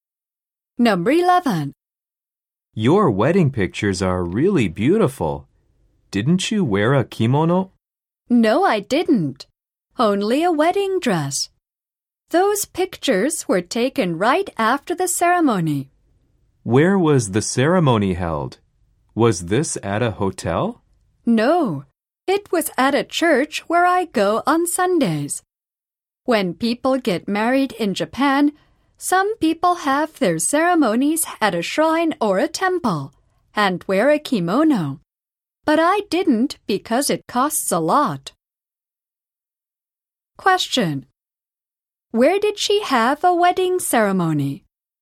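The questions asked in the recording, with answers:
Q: Where did she have a wedding ceremony?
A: At a church where she goes on Sundays.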